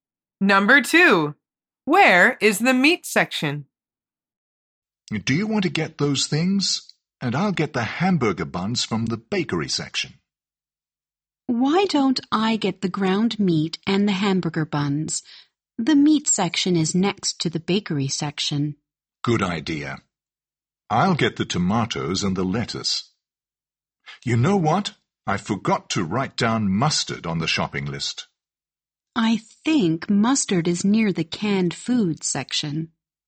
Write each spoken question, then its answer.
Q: Where is the meat section?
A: The answer is next to the bakery section.